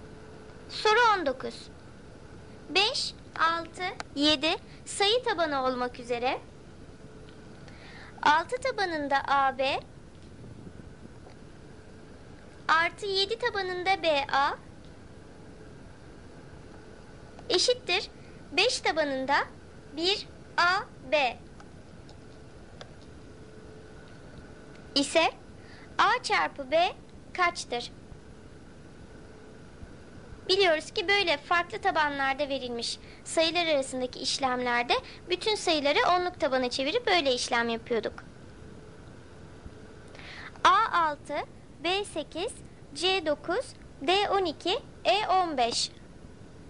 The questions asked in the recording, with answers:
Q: ise A çarpı B kaçtır?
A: Doğru cevap A6.